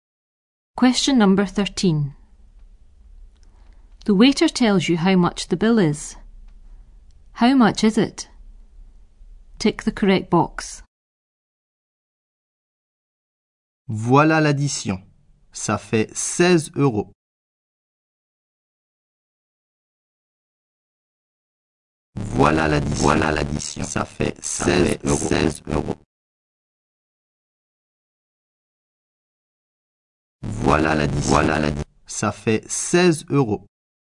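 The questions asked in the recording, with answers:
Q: How much is it?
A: 16 euros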